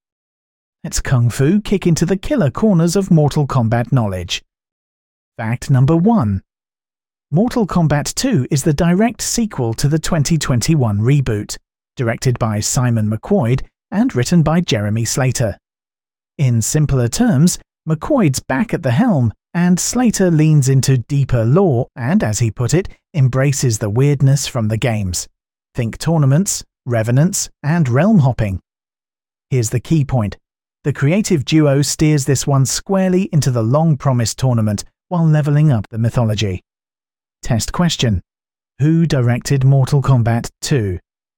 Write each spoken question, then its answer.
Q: Who directed Mortal Kombat 2?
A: Correct answer. Simon McQuoid.